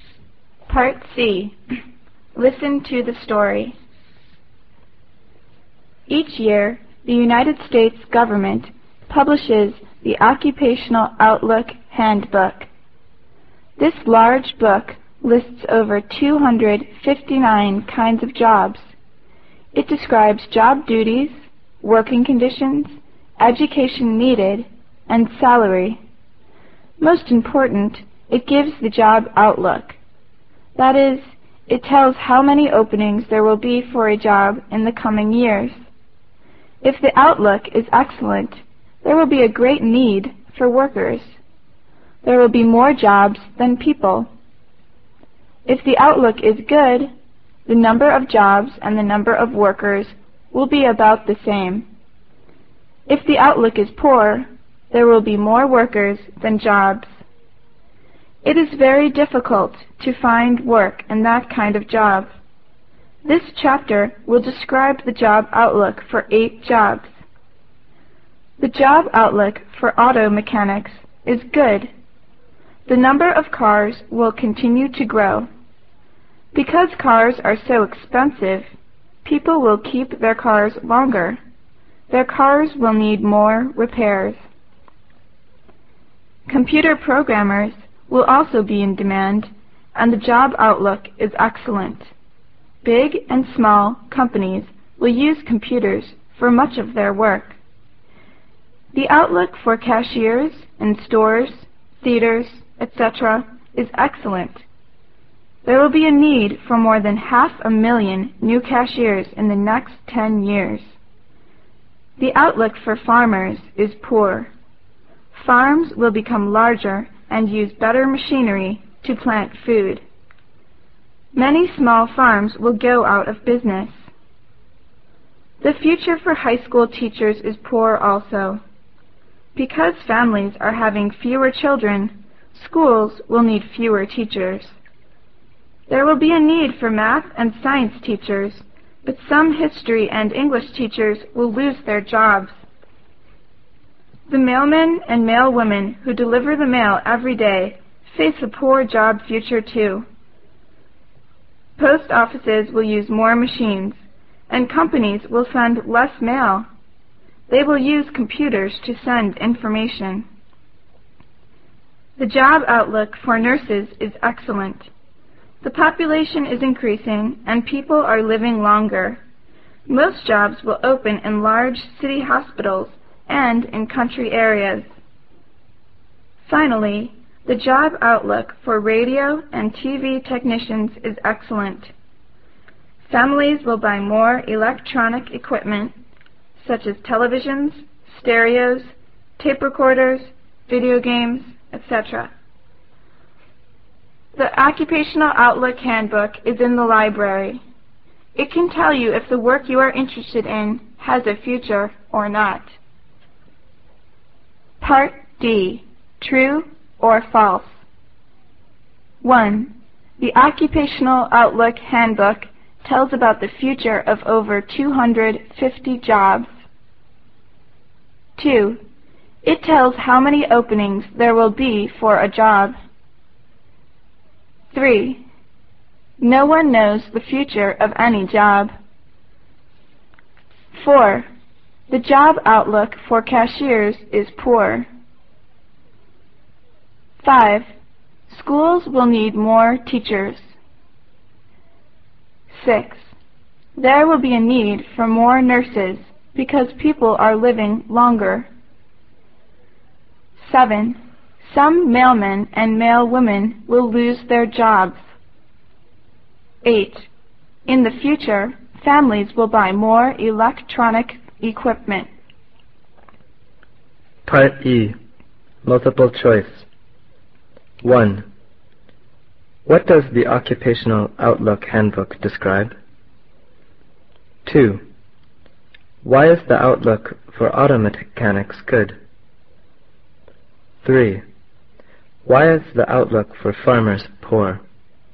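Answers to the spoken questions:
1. True
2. True
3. False
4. False
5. False
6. True
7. True
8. True
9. Job duties, working conditions, education needed, salary and job outlook
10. People will keep their cars longer, so cars will need more repairs
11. Farms will become larger and use better machinery, so many small farms will go out of business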